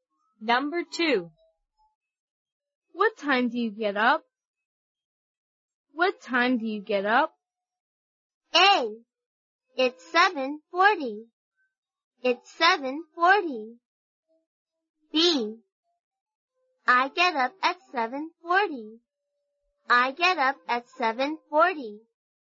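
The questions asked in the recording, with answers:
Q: What time do you get up?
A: B: I get up at 7:40.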